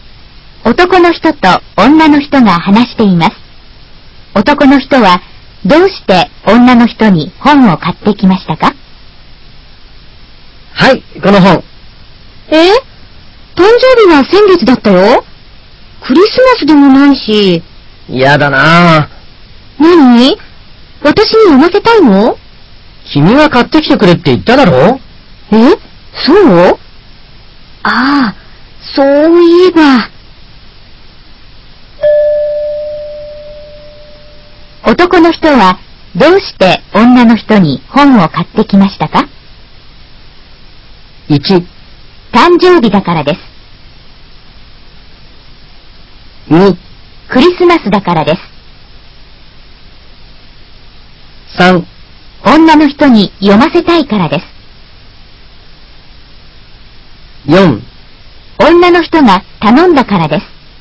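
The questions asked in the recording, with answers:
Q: 男の人はどうして女の人に本を買ってきましたか?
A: 4: 女の人が頼んだからです。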